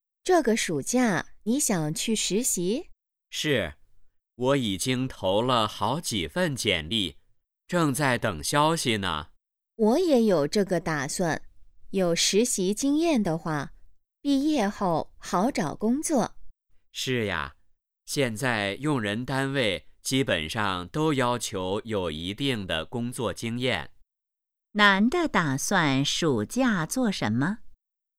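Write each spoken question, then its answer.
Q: 男的打算暑假做什么?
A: 去实习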